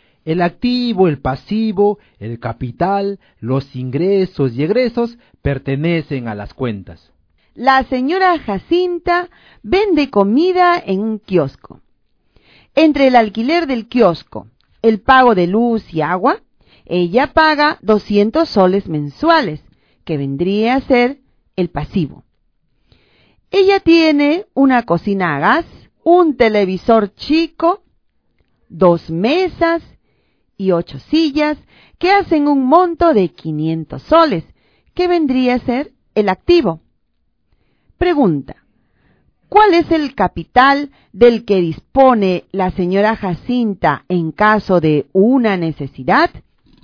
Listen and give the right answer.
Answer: 300 soles.